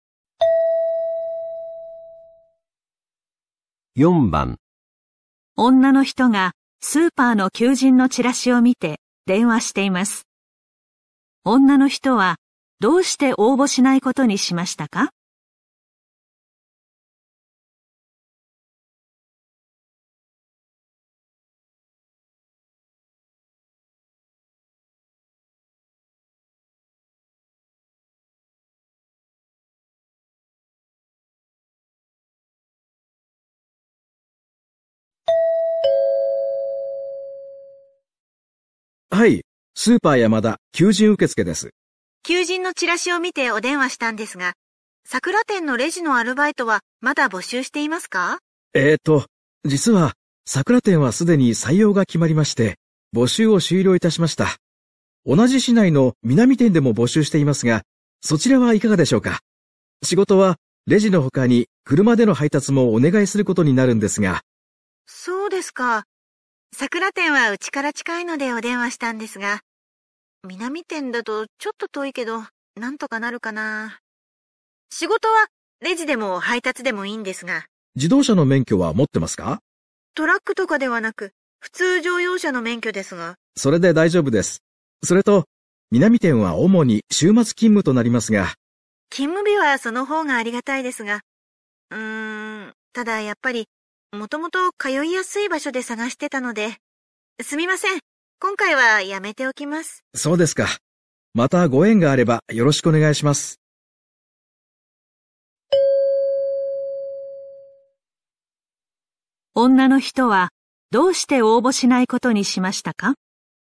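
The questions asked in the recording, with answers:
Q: 女の人はどうして応募しないことにしましたか?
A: 南店は家から遠く通いにくいから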